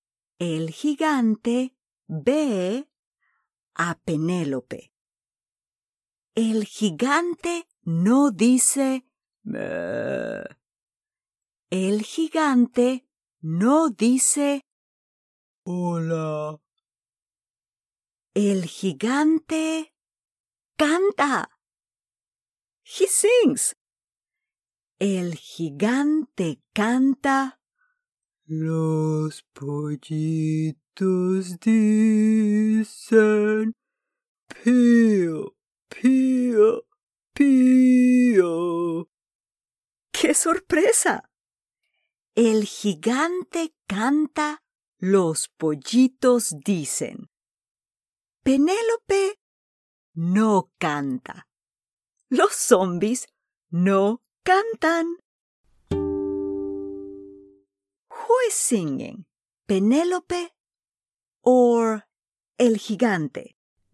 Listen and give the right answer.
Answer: Sí, el gigante.